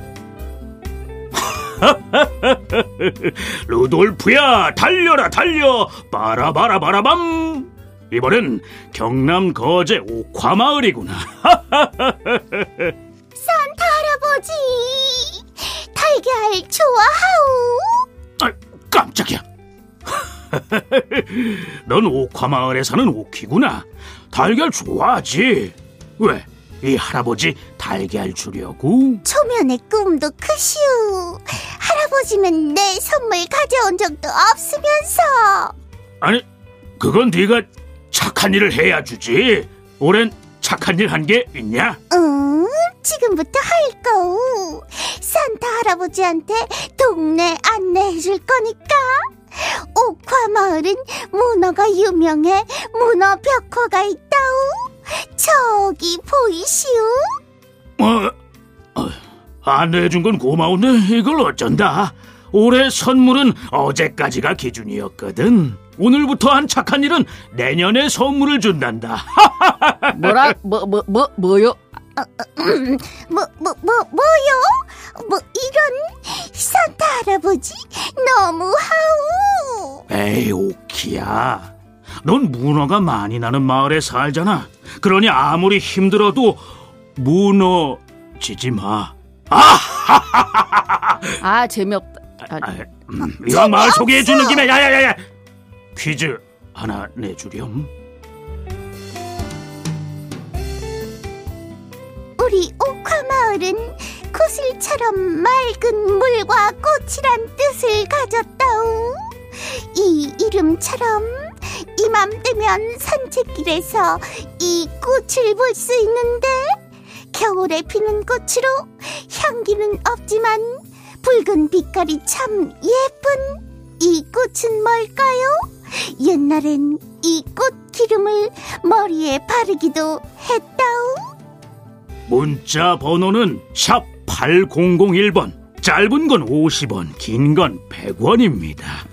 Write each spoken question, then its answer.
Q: 겨울에 피는 꽃으로 향기는 없지만 붉은 빛깔이 참 예쁜 이 꽃은 뭘까요?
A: 정답은 동백꽃입니다.